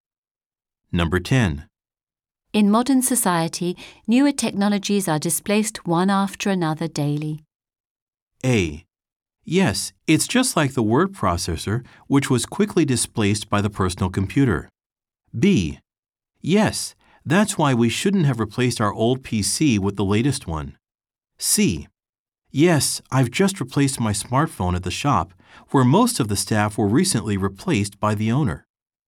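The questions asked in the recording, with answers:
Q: In modern society, newer technologies are displaced one after another daily.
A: A: Yes, it's just like the word processor, which was quickly displaced by the personal computer.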